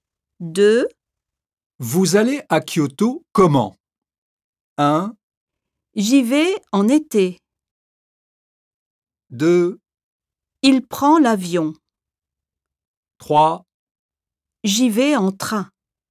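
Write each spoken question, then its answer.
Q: Vous allez à Kyoto comment?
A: 3: J'y vais en train.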